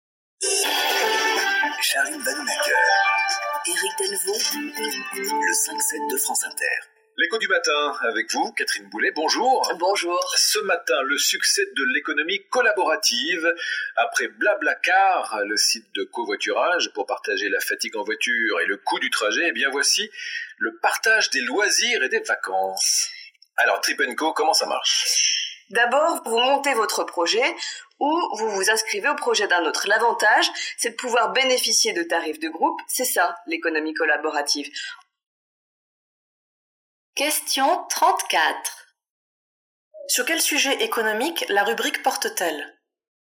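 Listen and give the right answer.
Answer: L'économie collaborative (le partage des loisirs et des vacances)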